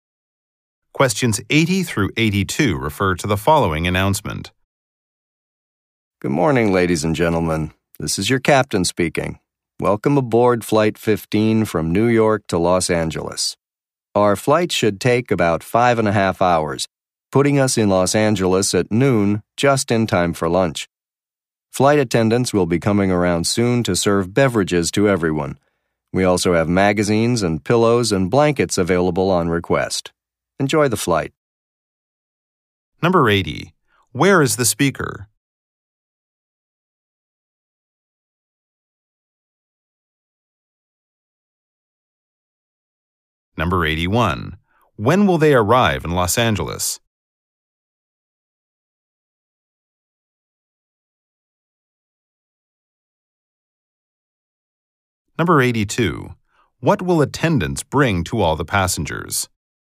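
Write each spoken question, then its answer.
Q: Where is the speaker?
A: On an airplane.

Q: When will they arrive in Los Angeles?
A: At noon.

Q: What will attendants bring to all the passengers?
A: Beverages.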